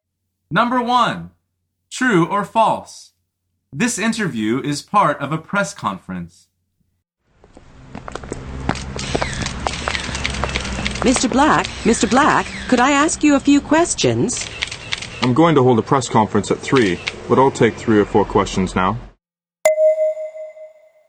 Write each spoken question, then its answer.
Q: True or false? This interview is part of a press conference.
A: The answer is false.